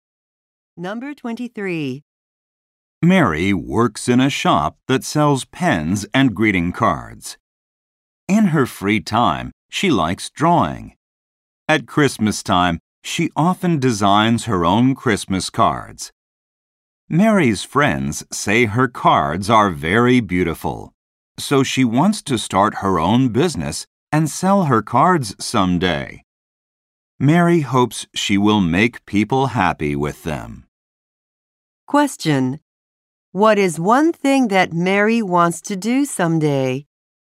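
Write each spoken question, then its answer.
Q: What is one thing that Mary wants to do someday?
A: Start her own business selling her cards.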